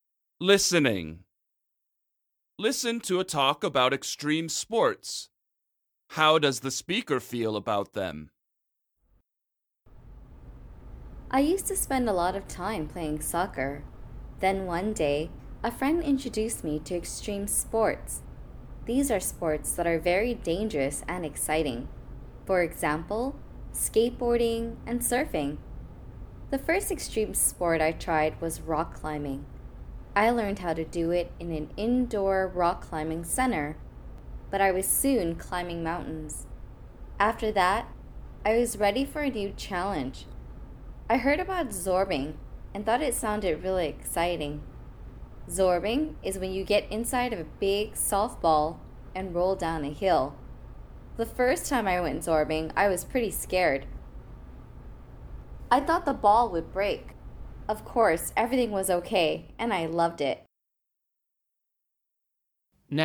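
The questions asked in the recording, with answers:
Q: How does the speaker feel about them?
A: He loves them and finds them exciting.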